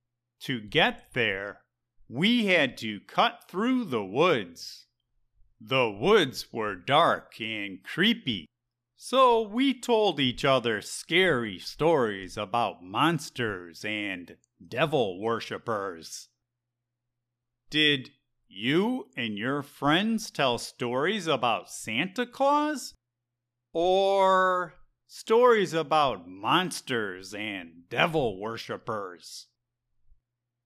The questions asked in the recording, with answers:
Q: Did you and your friends tell stories about Santa Claus? Or stories about monsters and devil worshippers?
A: We wanted the stories to be scary, so we told stories about monsters and devil worshippers, not Santa Claus.